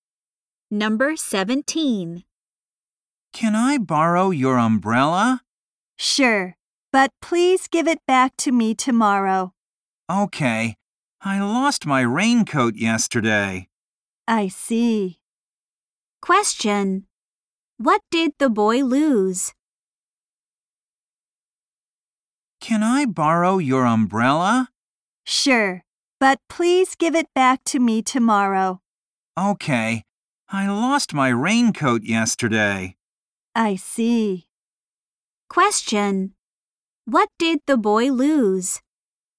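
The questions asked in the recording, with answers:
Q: What did the boy lose?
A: His raincoat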